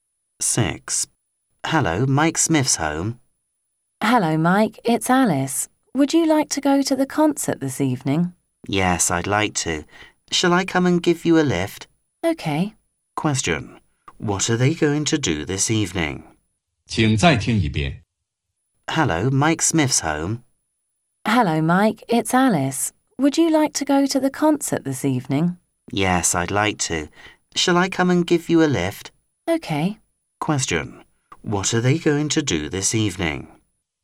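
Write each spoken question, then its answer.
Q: What are they going to do this evening?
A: Go to the concert.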